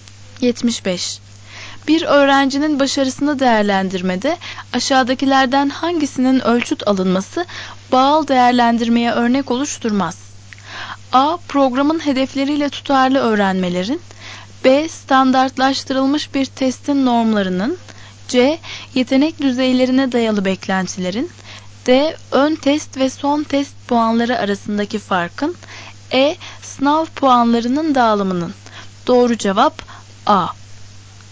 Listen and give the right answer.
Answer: Doğru cevap A.